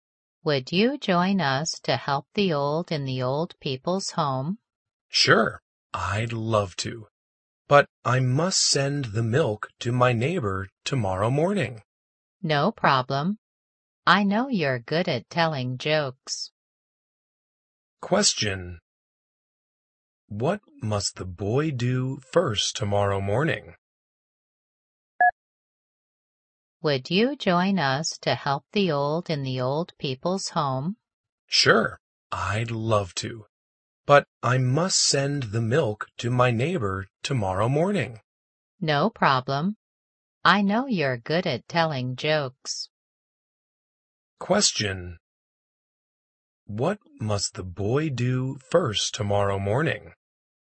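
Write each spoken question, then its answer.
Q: What must the boy do first tomorrow morning?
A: Send the milk to his neighbor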